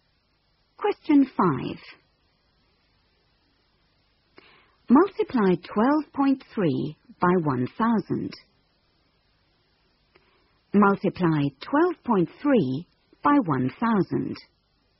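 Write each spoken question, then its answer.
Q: Multiply 12.3 by 1,000.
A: 12300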